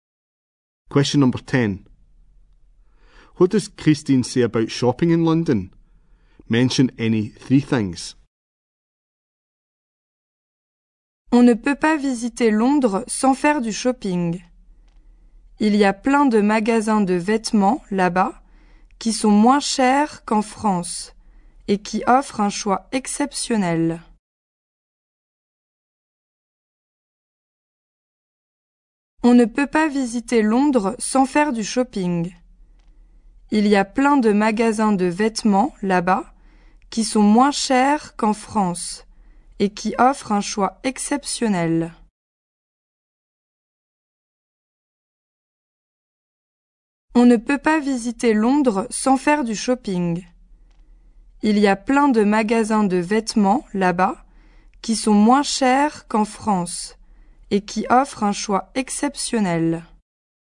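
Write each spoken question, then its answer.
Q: What does Christine say about shopping in London?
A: You can't visit London without shopping; lots of clothes shops; cheaper than in France; exceptional choice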